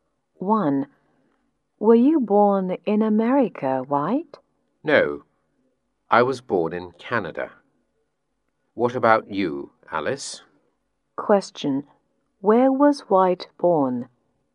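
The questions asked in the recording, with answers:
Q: Where was White born?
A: In Canada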